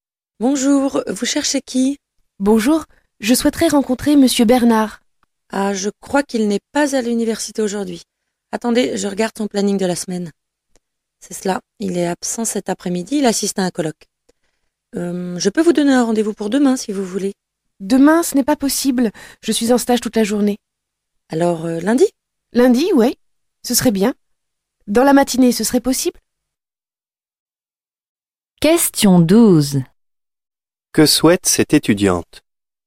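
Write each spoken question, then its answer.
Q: Que souhaite cette étudiante?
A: Rencontrer Monsieur Bernard (un rendez-vous)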